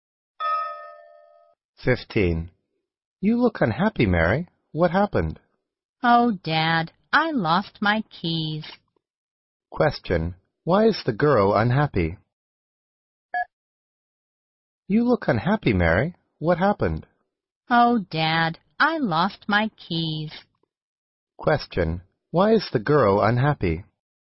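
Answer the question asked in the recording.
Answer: She lost her keys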